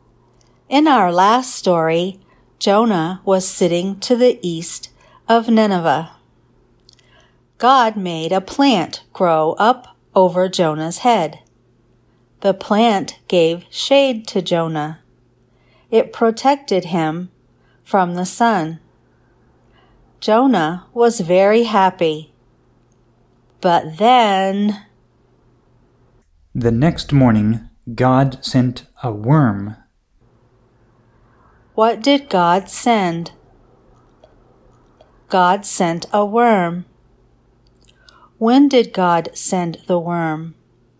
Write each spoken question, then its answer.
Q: When did God send the worm?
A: The next morning, God sent a worm.